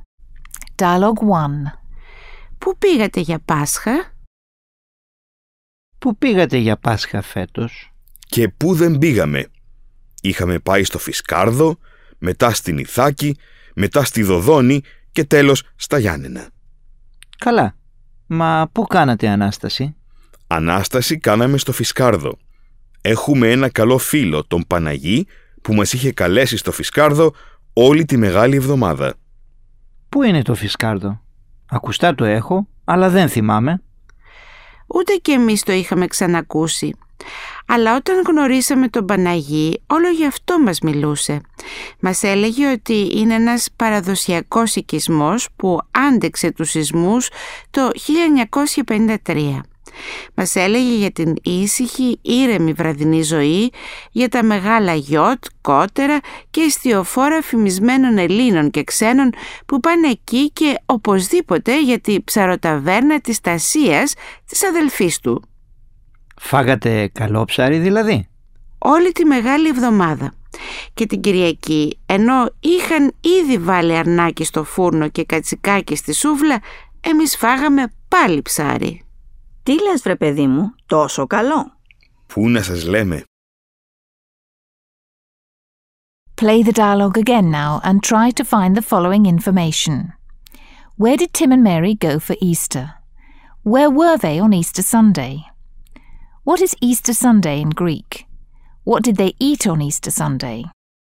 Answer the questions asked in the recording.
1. Tim and Mary went to Fiskardo, then to Ithaca, later to Dodoni, and at the end to Yanena.
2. They were in Fiskardo on Easter Sunday
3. Anastasi.
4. they ate fish, as they did all week long.